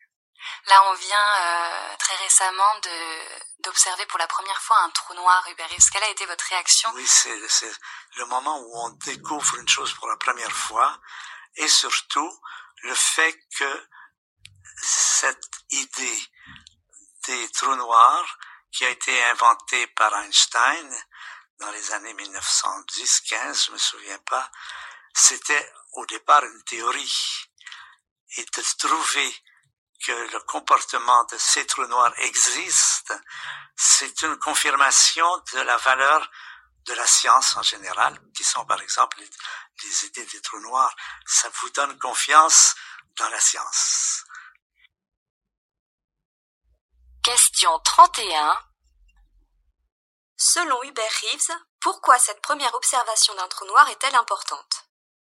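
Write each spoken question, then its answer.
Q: Selon Hubert Reeves, pourquoi cette première observation d'un trou noir est-elle importante ?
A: Elle confirme la valeur de la science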